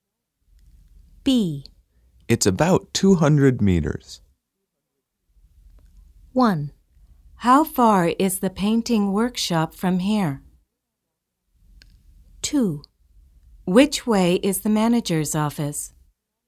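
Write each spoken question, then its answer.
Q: It's about 200 meters.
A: 1: How far is the painting workshop from here?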